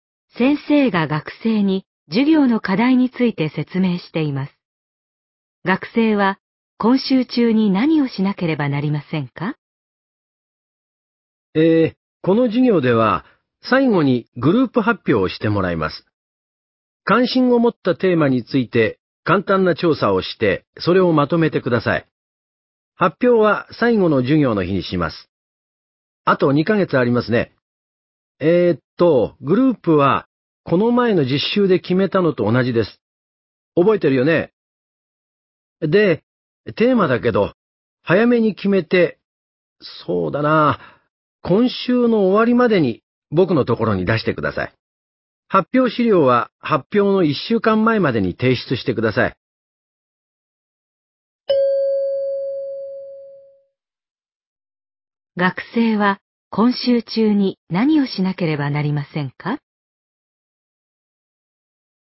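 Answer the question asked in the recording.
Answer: 発表のテーマを決めて先生に出す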